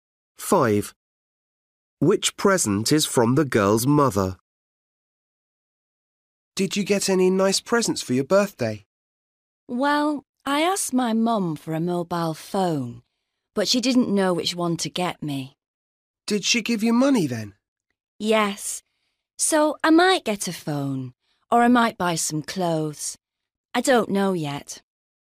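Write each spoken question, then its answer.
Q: Which present is from the girl's mother?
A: Money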